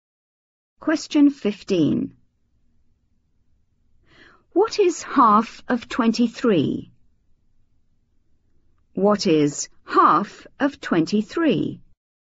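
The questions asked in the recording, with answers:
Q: What is half of 23?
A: 11.5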